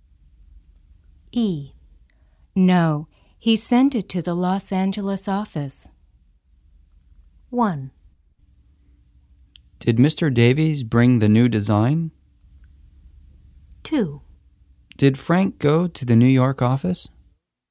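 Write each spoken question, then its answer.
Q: No, he sent it to the Los Angeles office.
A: 1: Did Mr. Davies bring the new design?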